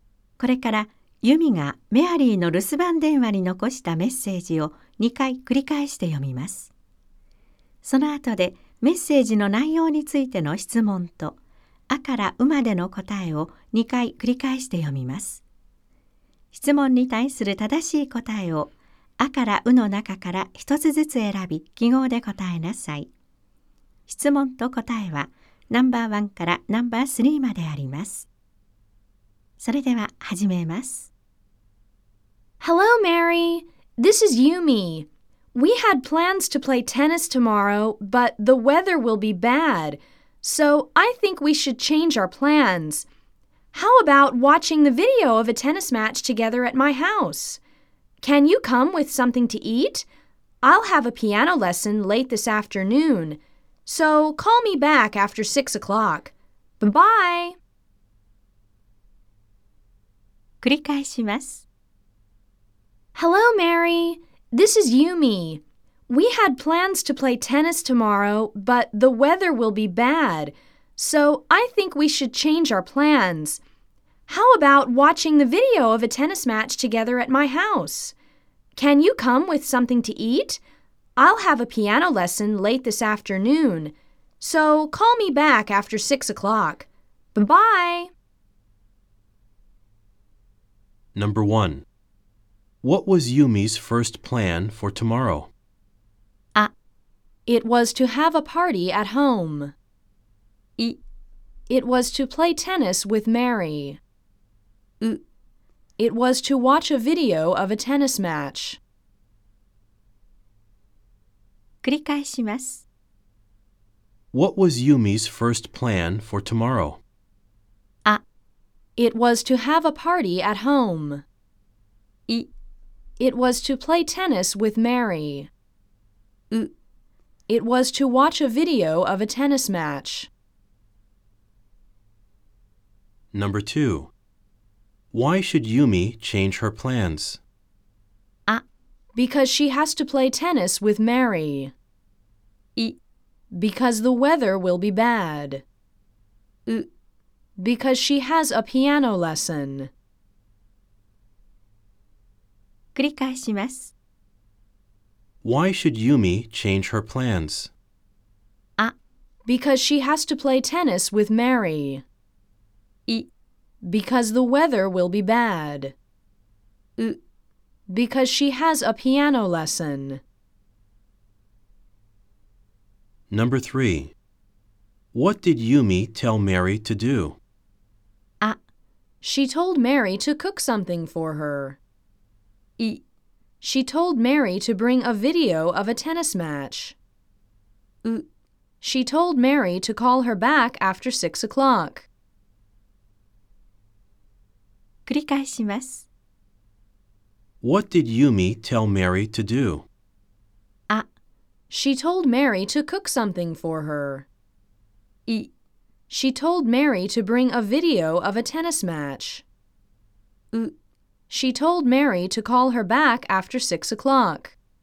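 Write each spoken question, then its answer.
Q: What was Yumi's first plan for tomorrow?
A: イ: It was to play tennis with Mary.

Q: Why should Yumi change her plans?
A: イ: Because the weather will be bad.

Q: What did Yumi tell Mary to do?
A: ウ: She told Mary to call her back after 6 o'clock.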